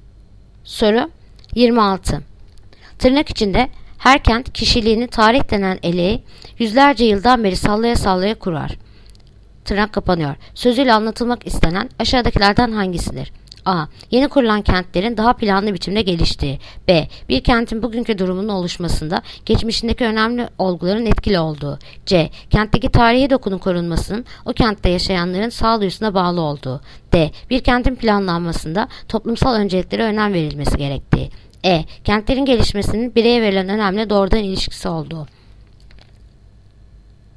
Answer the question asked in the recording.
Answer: Yanıt: Bursa. Bir kentin bugünkü durumun oluşmasında geçmişteki önemli olguların etkili olduğu.